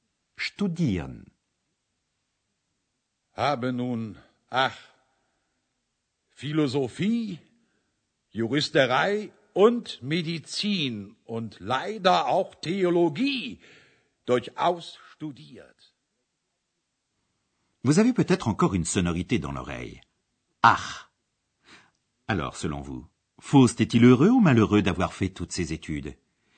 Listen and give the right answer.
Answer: Oui, il est malheureux.